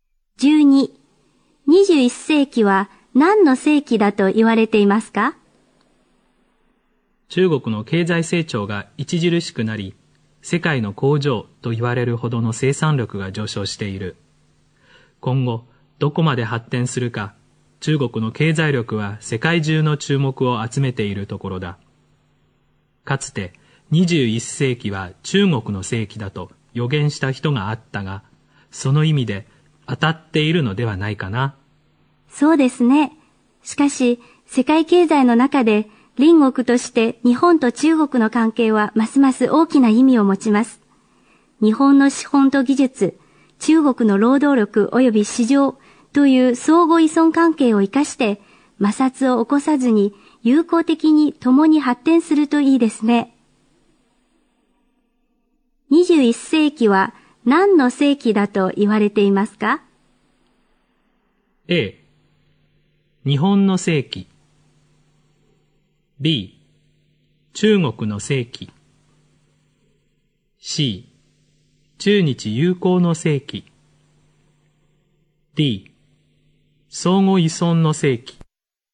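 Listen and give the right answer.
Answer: B: 中国の世紀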